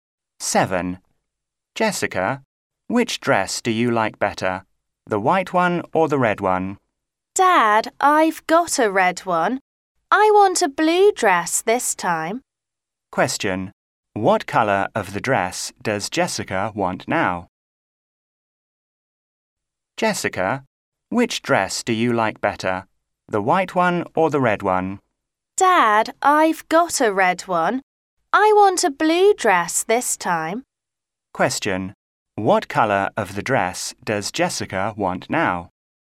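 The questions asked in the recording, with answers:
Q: What colour of the dress does Jessica want now?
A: Blue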